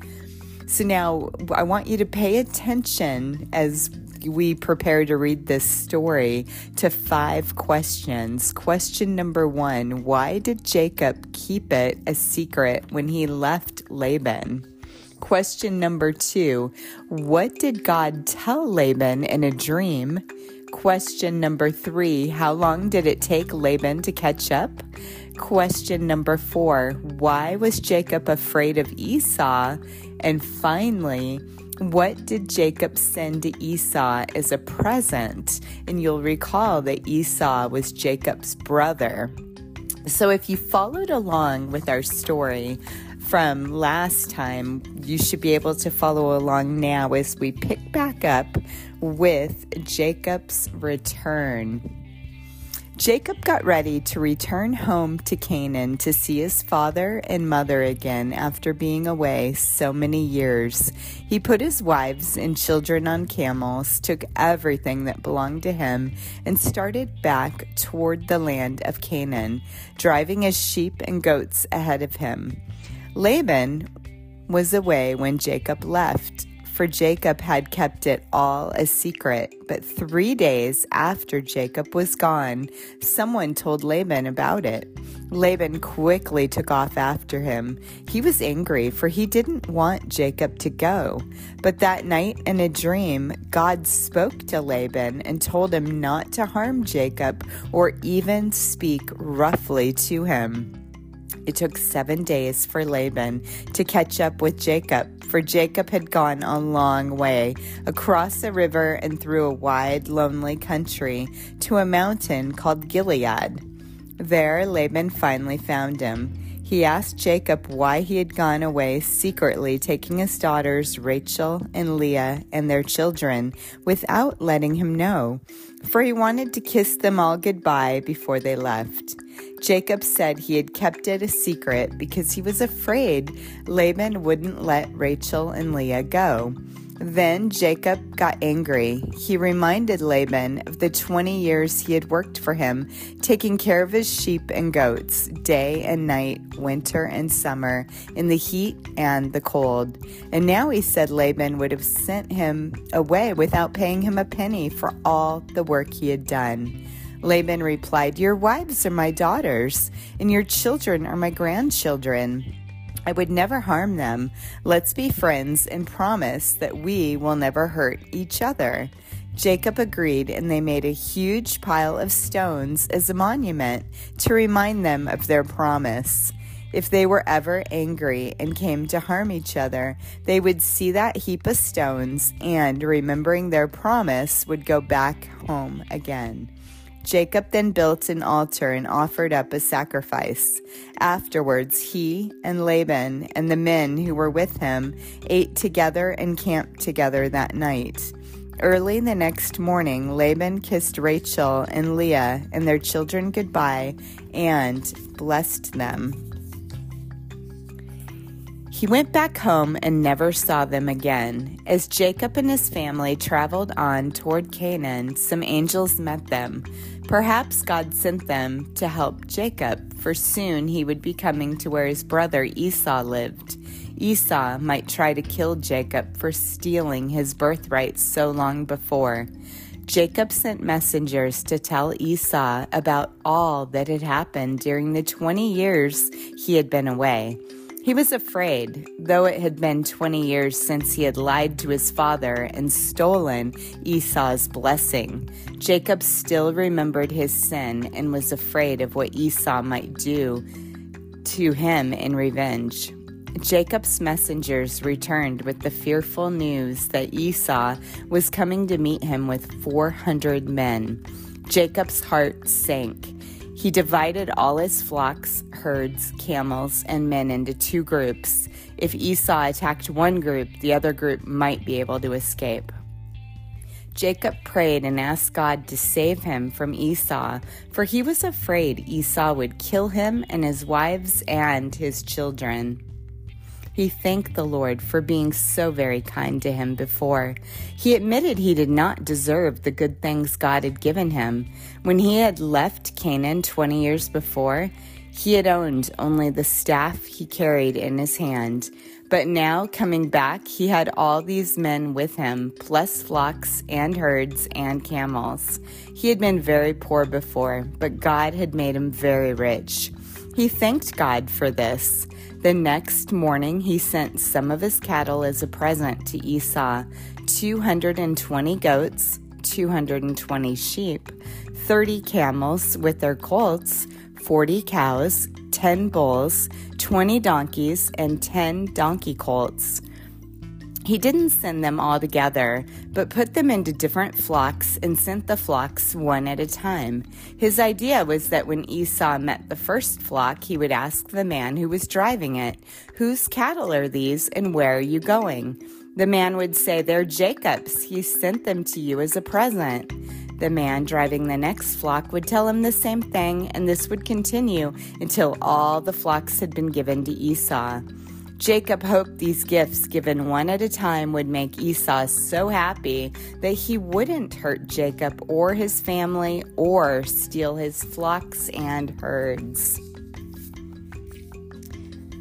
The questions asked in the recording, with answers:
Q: why did Jacob keep it a secret when he left Laban?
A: Jacob said he had kept it a secret because he was afraid Laban wouldn't let Rachel and Leah go.

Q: what did God tell Laban in a dream?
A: God spoke to Laban in a dream and told him not to harm Jacob or even speak roughly to him.

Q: how long did it take Laban to catch up?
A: It took 7 days for Laban to catch up with Jacob, for Jacob had gone a long way.

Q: why was Jacob afraid of Esau?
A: Jacob feared that Esau might try to kill Jacob because, remember, Jacob had stolen his birthright so long before.

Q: what did Jacob send to Esau as a present?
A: He sent ahead flocks, 220 goats, 220 sheep, 30 camels with their colts, 40 cows, 10 bulls, 20 donkeys, and 10 colts, donkey colts.